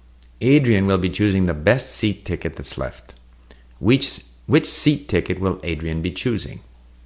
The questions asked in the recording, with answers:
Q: Which seat ticket will Adrian be choosing?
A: He will be choosing the best seat ticket that's left.